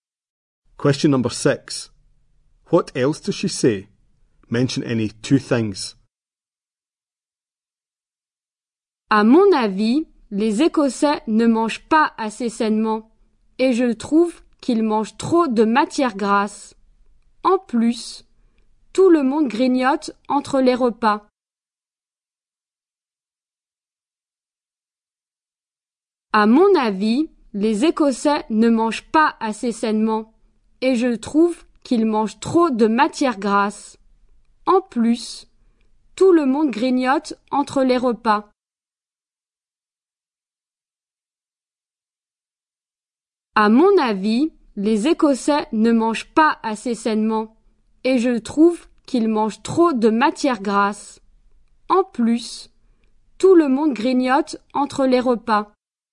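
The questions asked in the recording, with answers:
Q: What else does she say?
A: Scots don't eat healthily enough; they eat too much fat; everyone snacks between meals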